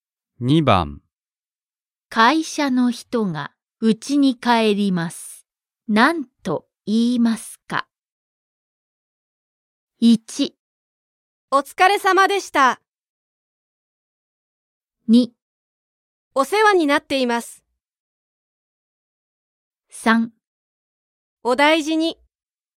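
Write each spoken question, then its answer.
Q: 会社の人が家に帰ります。何と言いますか?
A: 1: お疲れ様でした。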